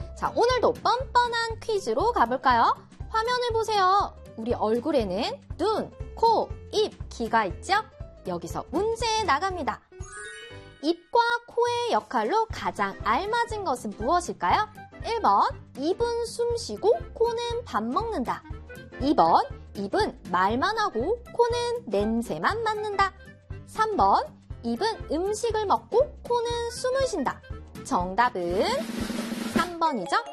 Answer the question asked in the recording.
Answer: 정답은 3번이죠?